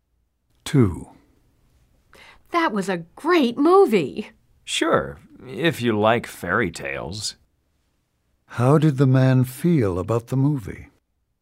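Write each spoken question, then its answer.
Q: How did the man feel about the movie?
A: He did not like it; he thought it was unrealistic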